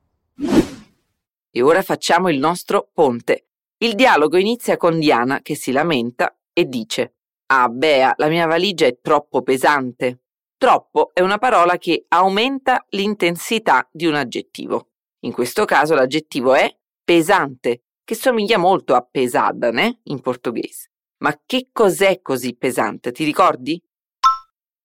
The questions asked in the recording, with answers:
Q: Ma che cos'è così pesante?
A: La valigia.